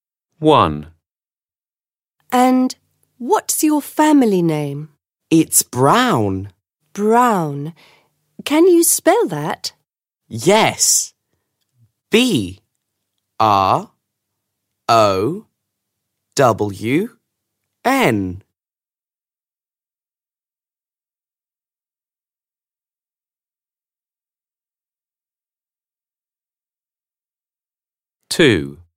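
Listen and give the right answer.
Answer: Brown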